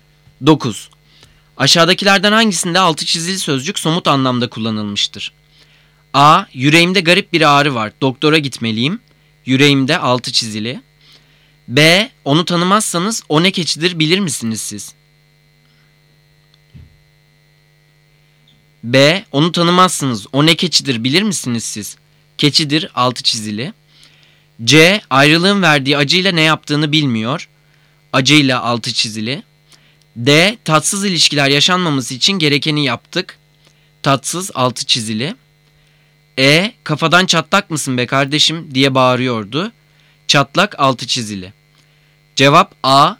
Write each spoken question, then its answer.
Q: Aşağıdakilerden hangisinde altı çizili sözcük somut anlamda kullanılmıştır?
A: Cevap A.